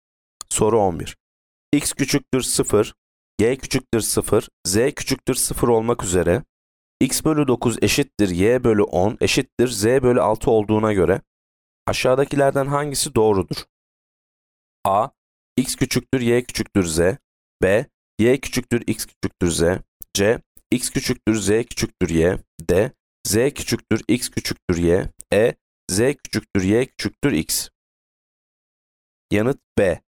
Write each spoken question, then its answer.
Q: X küçüktür 0. Y küçüktür 0, Z küçüktür 0 olmak üzere X bölü 9 eşittir Y bölü 10 eşittir Z bölü 6 olduğuna göre aşağıdakilerden hangisi doğrudur?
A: Yanıt B. Y küçüktür X küçüktür Z.